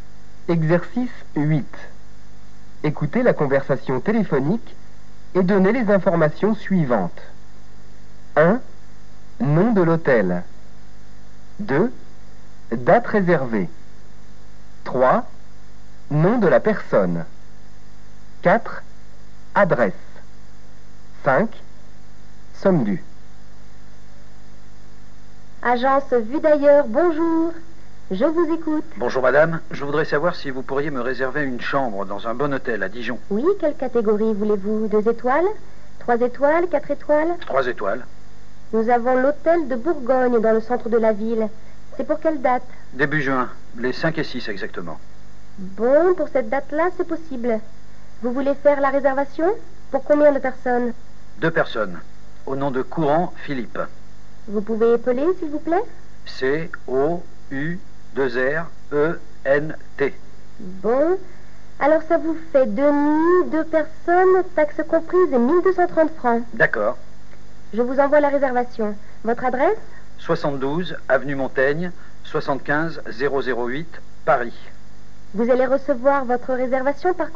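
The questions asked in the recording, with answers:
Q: Nom de l'hôtel.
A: Hôtel de Bourgogne

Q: Date réservée.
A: Les 5 et 6 juin

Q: Adresse.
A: 72 avenue Montaigne, 75008 Paris

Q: Somme due.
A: 1230 francs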